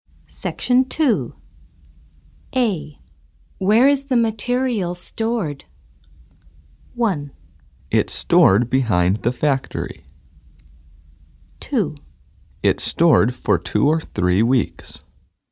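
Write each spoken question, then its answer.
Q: Where is the material stored?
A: 1: It's stored behind the factory.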